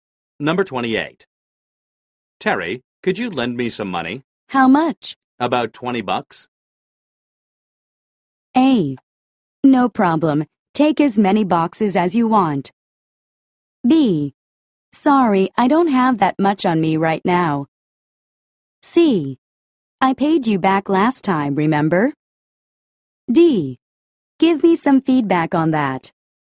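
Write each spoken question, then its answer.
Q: About 20 bucks.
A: B: Sorry, I don't have that much on me right now.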